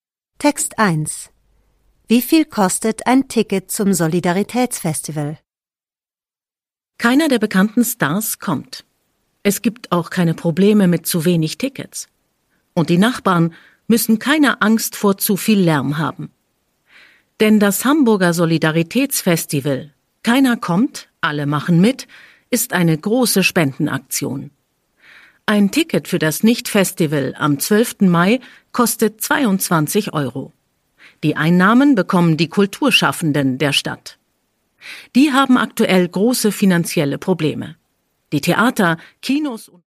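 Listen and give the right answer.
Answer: 22 Euro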